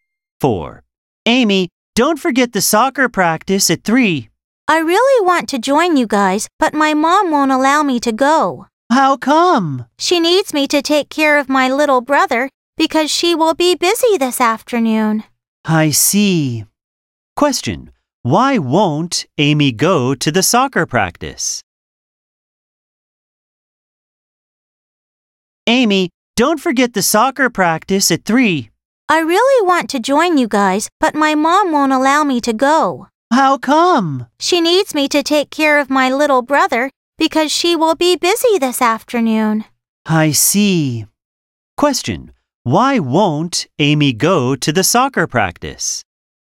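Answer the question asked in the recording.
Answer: She has to take care of her little brother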